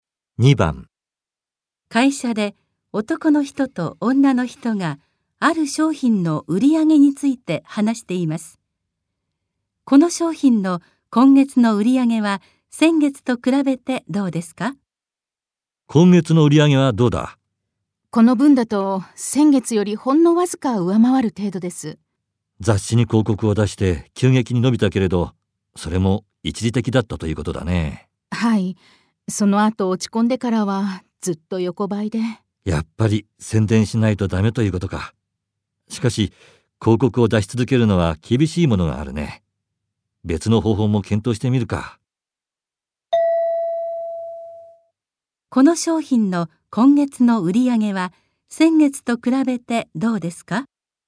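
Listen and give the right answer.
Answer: 先月よりほんのわずか上回る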